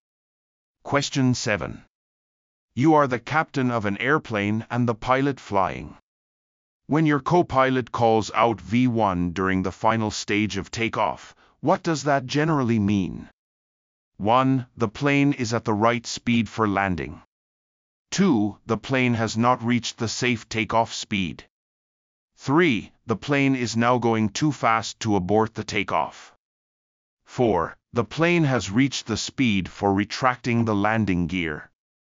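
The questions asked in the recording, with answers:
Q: When your co-pilot calls out V1 during the final stage of takeoff, what does that generally mean?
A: 3: The plane is now going too fast to abort the takeoff.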